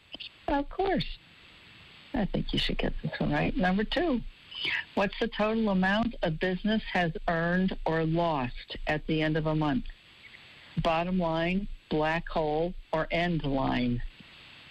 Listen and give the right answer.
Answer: Yes, bottom line.